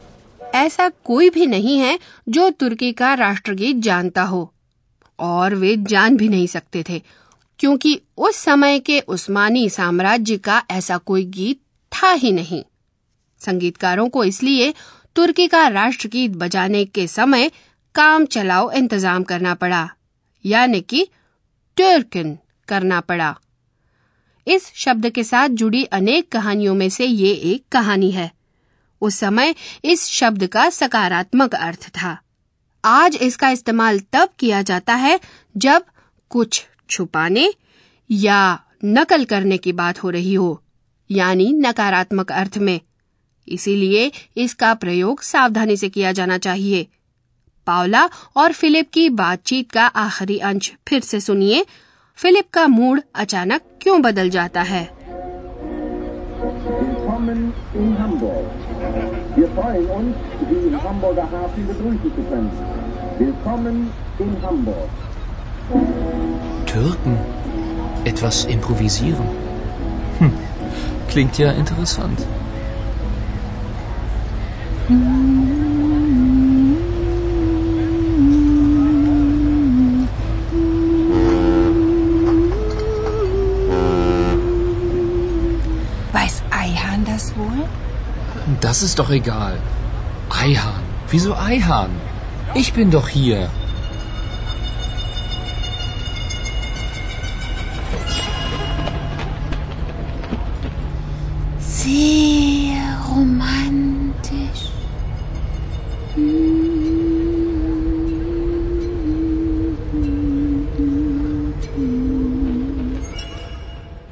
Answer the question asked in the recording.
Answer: जिक्र होने के कारण बदल जाता है